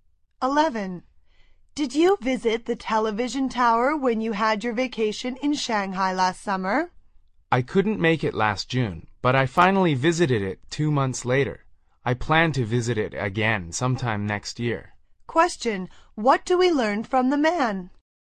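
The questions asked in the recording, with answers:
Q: What do we learn from the man?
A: He visited the TV tower in August, not in June as planned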